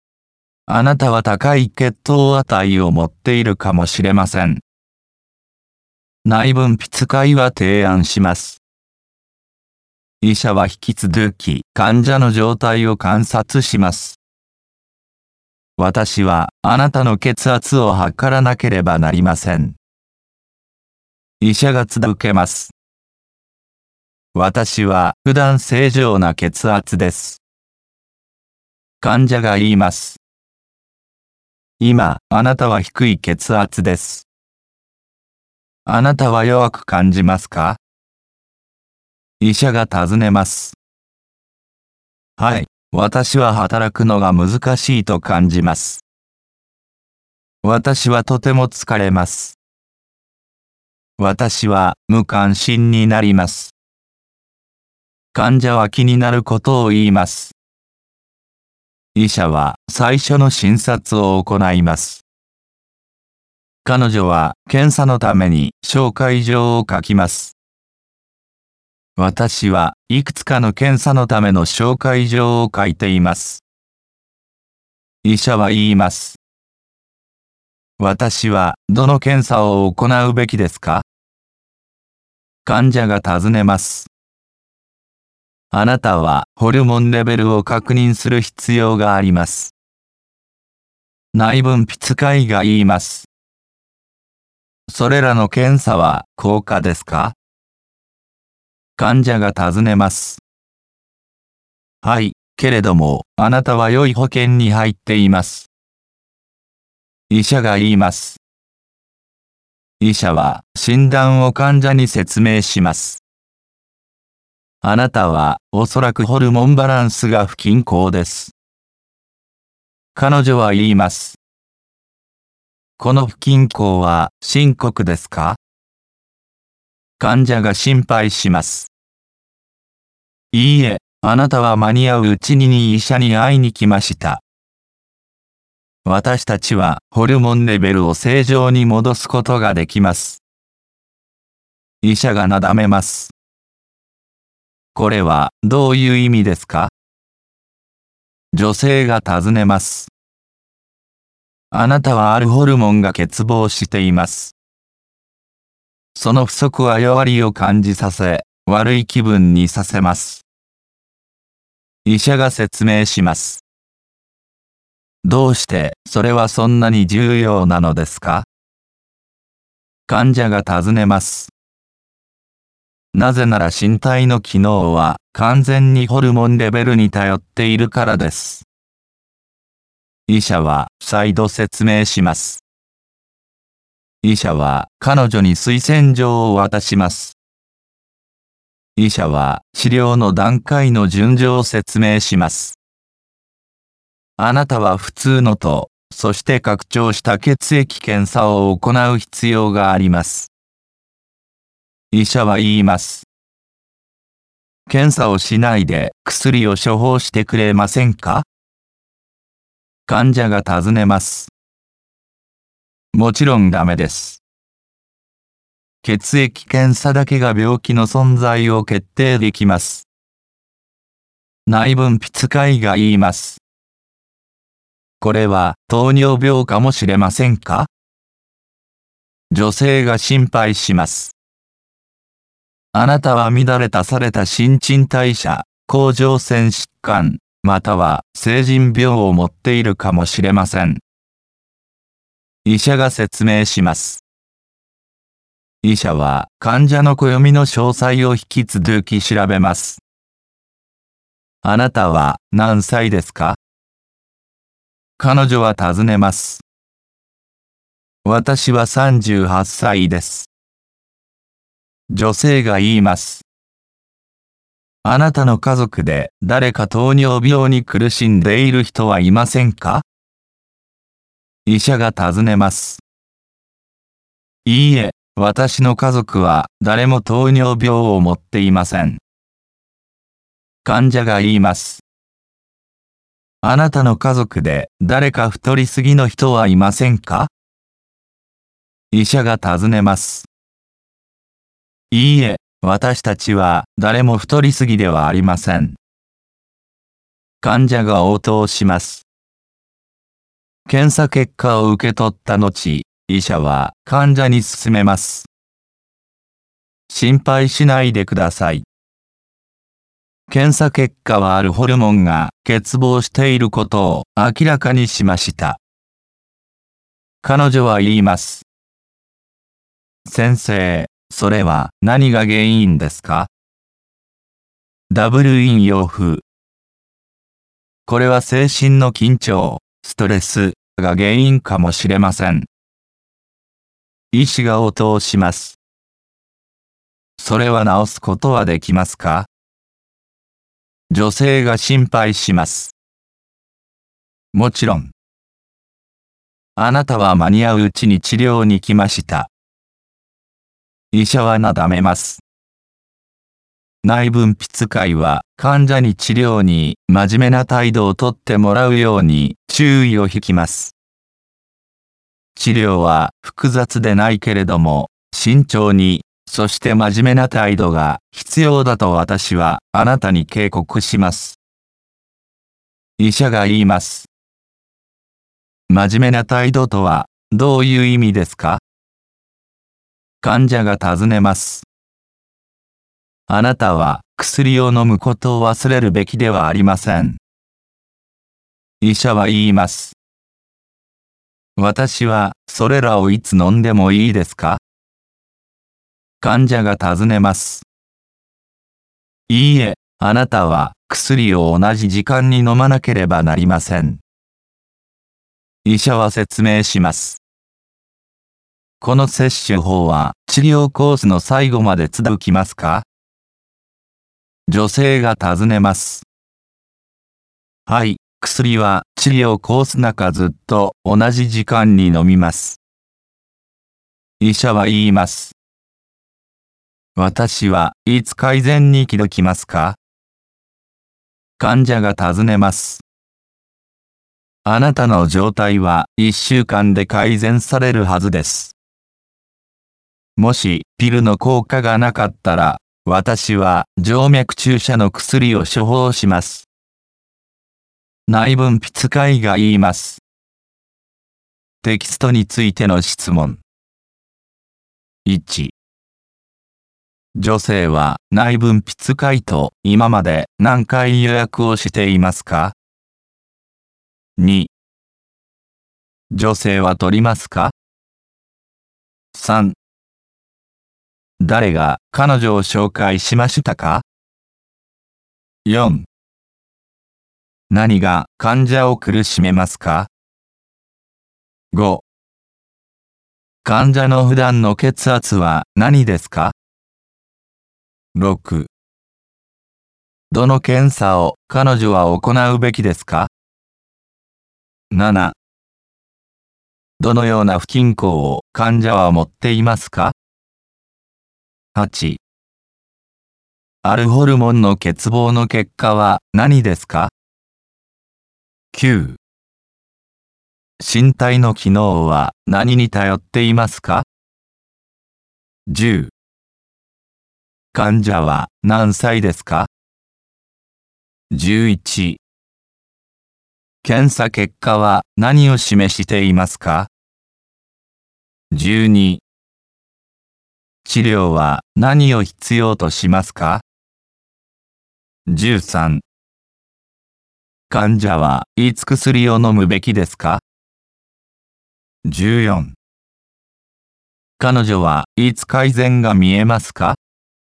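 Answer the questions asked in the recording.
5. 正常な血圧
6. ホルモンレベルを確認する検査(普通のと拡張した血液検査)
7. ホルモンバランスの不均衡
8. 弱りを感じ、悪い気分になる
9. ホルモンレベル
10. 38歳
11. あるホルモンが欠乏していること
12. 慎重で真面目な態度
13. 毎日同じ時間に
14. 1週間で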